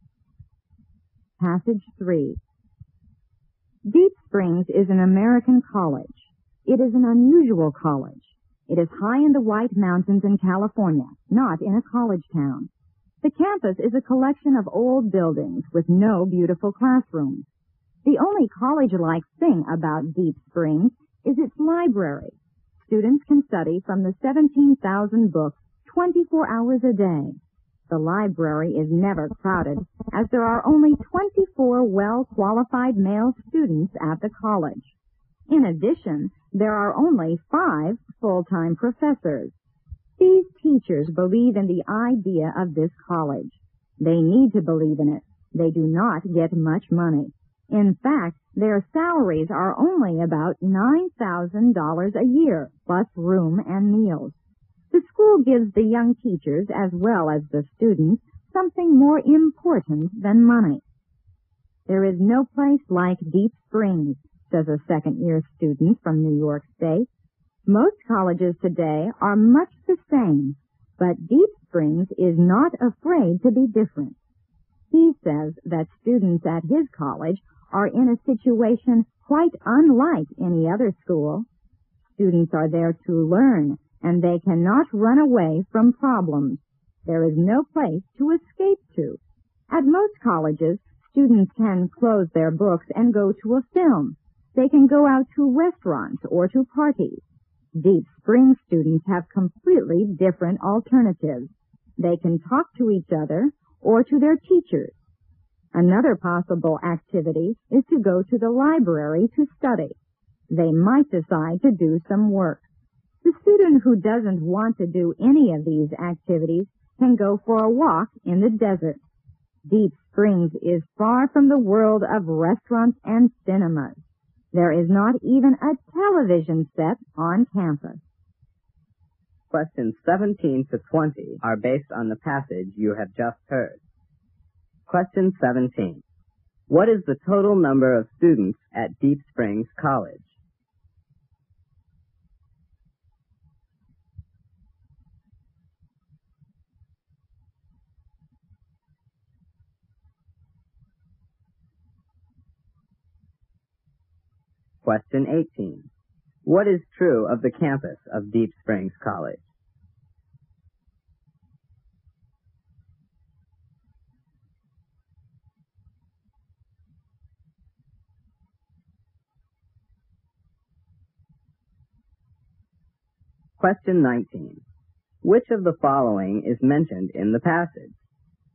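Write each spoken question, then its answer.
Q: What is the total number of students at Deep Springs College?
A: 24

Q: What is true of the campus of Deep Springs College?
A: It is a collection of old buildings with no beautiful classrooms.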